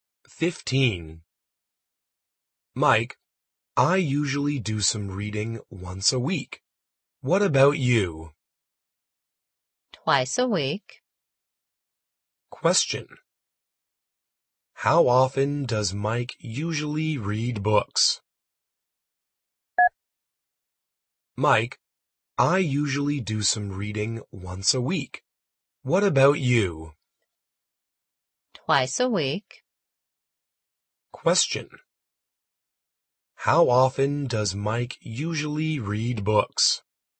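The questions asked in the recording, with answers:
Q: How often does Mike usually read books?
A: Twice a week.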